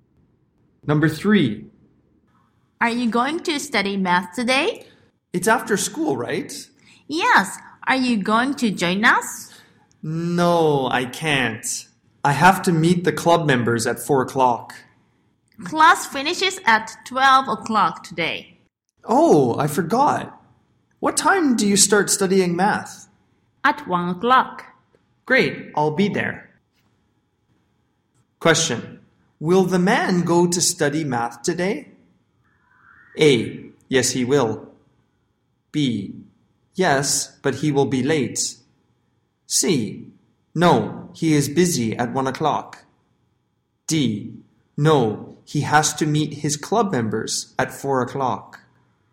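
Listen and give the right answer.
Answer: A: Yes, he will.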